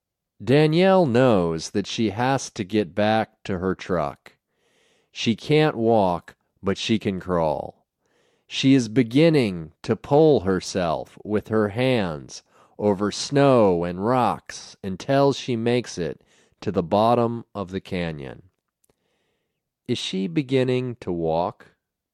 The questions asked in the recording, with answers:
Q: Is she beginning to walk?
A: No, she isn't beginning to walk.